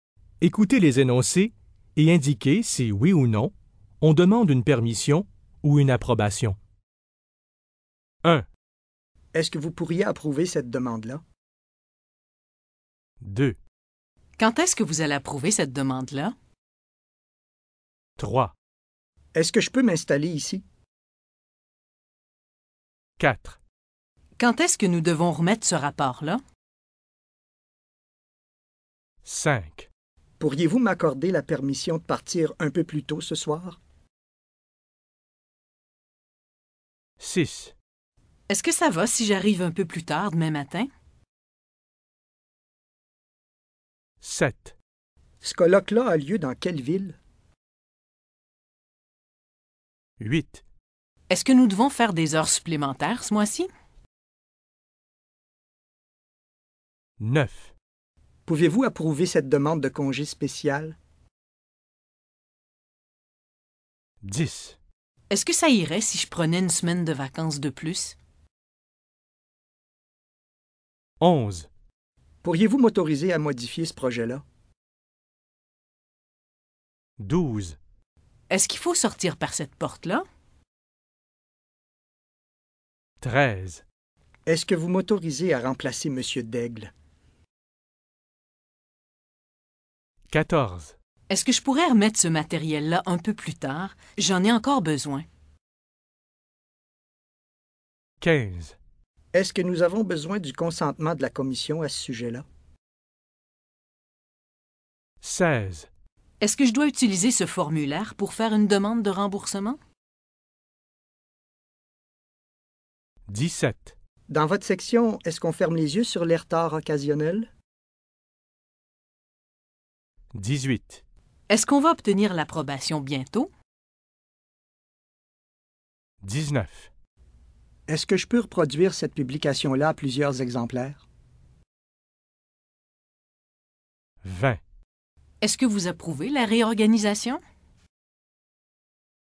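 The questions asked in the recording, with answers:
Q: Est-ce que vous pourriez approuver cette demande-là?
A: oui

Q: Quand est-ce que vous allez approuver cette demande-là?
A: non

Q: Est-ce que je peux m'installer ici?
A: oui

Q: Quand est-ce que nous devons remettre ce rapport-là?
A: non

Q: Pourriez-vous m'accorder la permission de partir un peu plus tôt ce soir?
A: oui

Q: Est-ce que ça va si j'arrive un peu plus tard demain matin?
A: oui

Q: Ce colloque-là a lieu dans quelle ville?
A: non

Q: Est-ce que nous devons faire des heures supplémentaires ce mois-ci?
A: non

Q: Pouvez-vous approuver cette demande de congé spécial?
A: oui

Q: Est-ce que ça irait si je prenais une semaine de vacances de plus?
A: oui

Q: Pourriez-vous m'autoriser à modifier ce projet-là?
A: oui

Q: Est-ce qu'il faut sortir par cette porte-là?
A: non

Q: Est-ce que vous m'autorisez à remplacer M. Daigle?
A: oui

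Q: Est-ce que je pourrais remettre ce matériel-là un peu plus tard? J'en ai encore besoin.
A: oui

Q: Est-ce que je dois utiliser ce formulaire pour faire une demande de remboursement?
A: non

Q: Est-ce qu'on va obtenir l'approbation bientôt?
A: non

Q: Est-ce que je peux reproduire cette publication-là à plusieurs exemplaires?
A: oui

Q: Est-ce que vous approuvez la réorganisation?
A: oui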